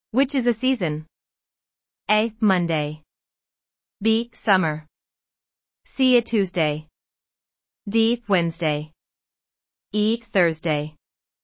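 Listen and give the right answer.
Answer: B: Summer.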